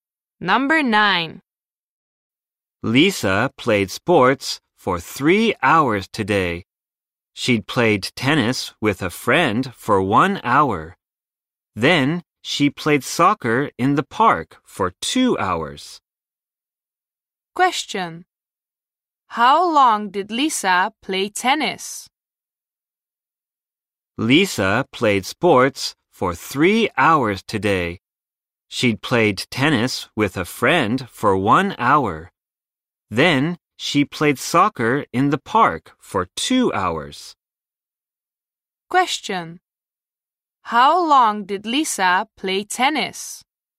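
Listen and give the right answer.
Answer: For 1 hour.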